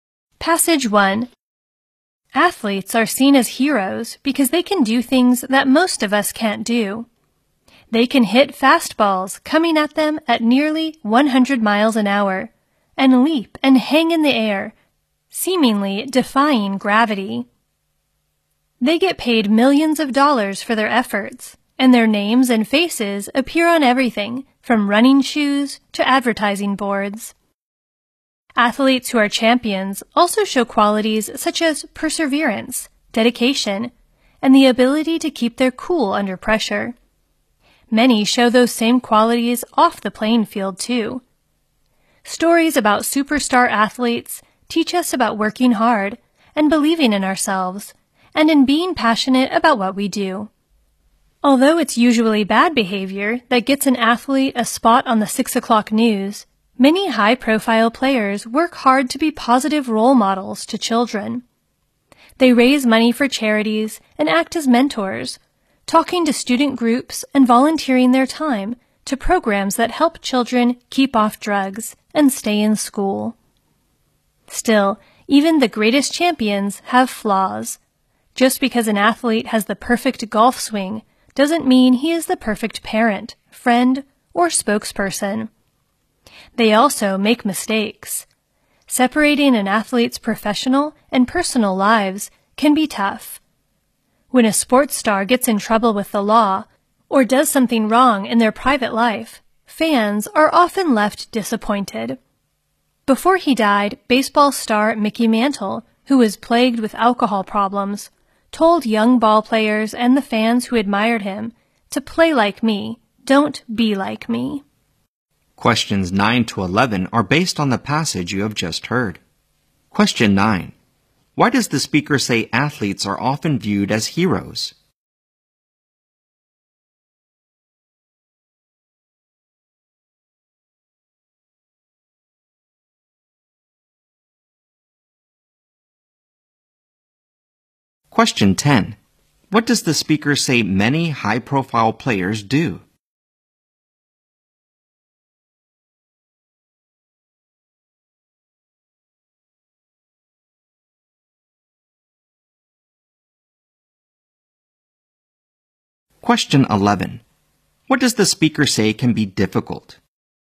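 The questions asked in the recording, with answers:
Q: Why does the speaker say athletes are often viewed as heroes?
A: They can do things most of us can't do

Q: What does the speaker say many high-profile players do?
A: Work hard to be positive role models to children

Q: What does the speaker say can be difficult?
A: Separating an athlete's professional and personal lives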